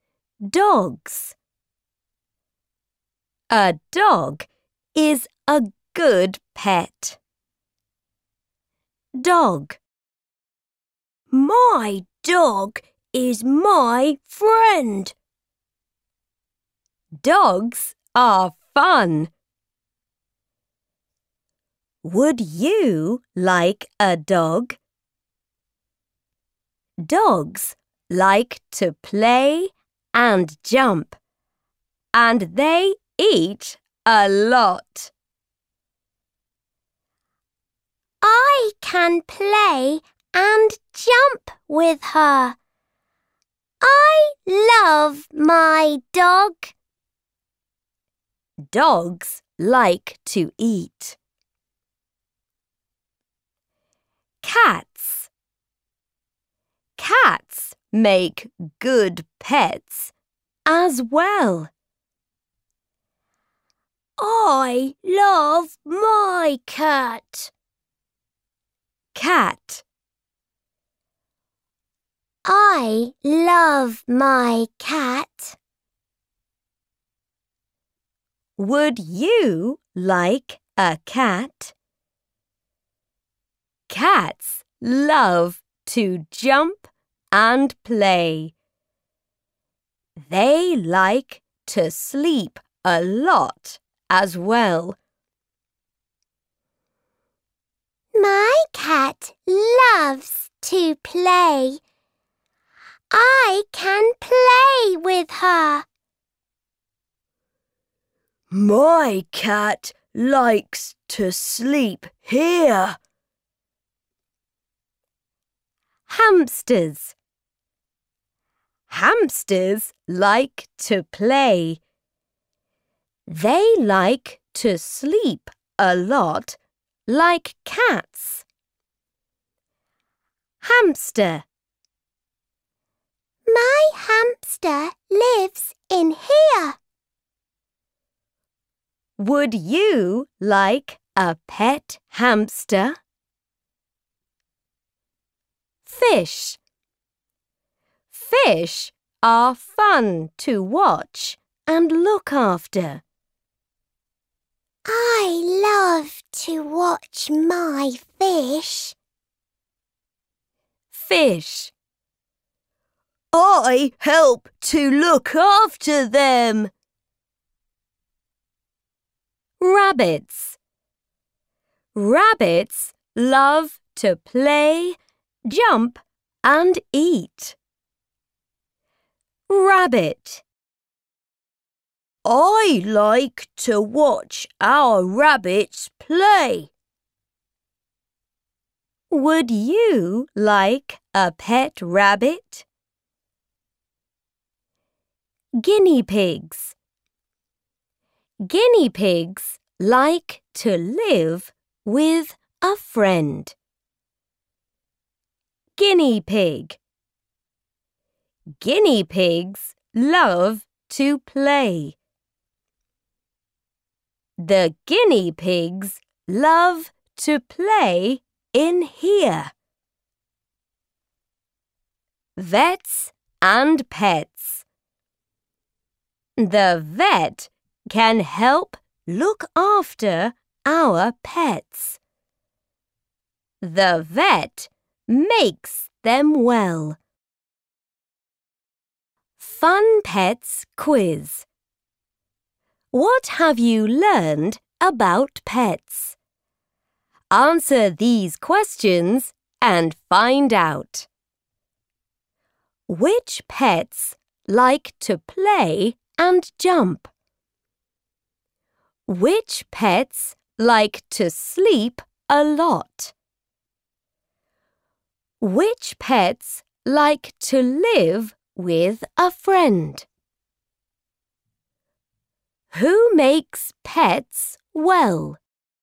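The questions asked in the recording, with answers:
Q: Which pets like to play and jump?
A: Dogs, cats and rabbits

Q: Which pets like to sleep a lot?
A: Cats and hamsters

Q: Which pets like to live with a friend?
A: Guinea pigs

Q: Who makes pets well?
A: The vet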